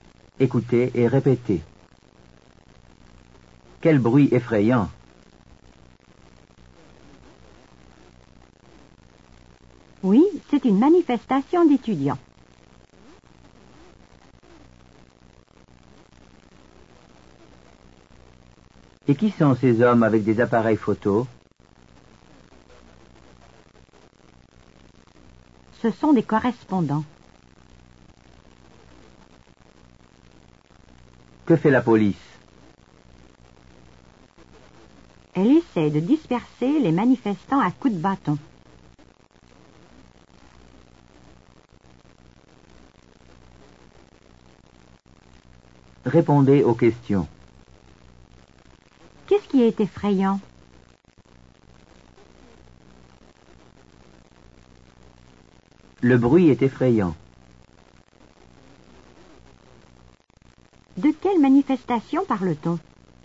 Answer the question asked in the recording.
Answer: On parle d'une manifestation d'étudiants.